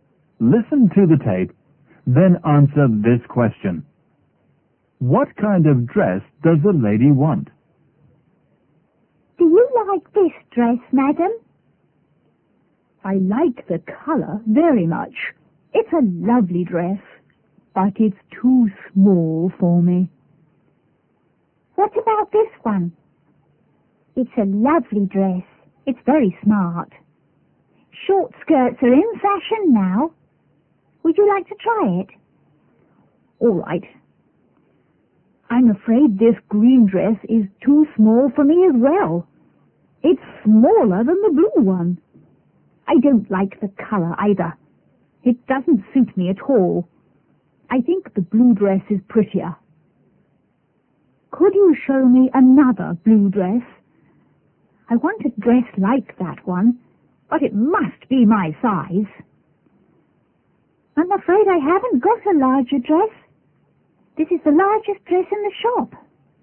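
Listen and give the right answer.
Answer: A blue dress like the first one, but in her size (larger)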